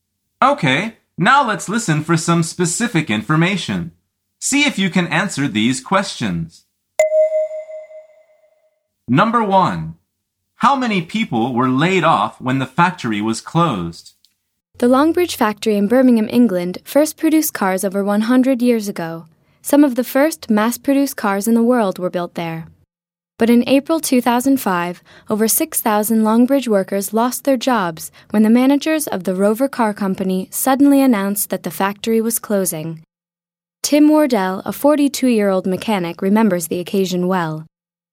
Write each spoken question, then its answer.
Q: How many people were laid off when the factory was closed?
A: The answer is over 6,000.